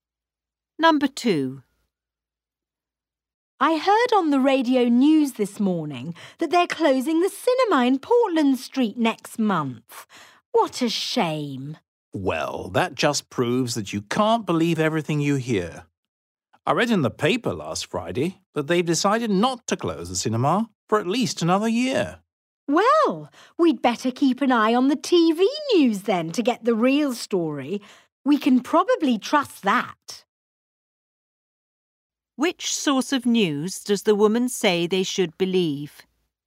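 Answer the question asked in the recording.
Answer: The TV news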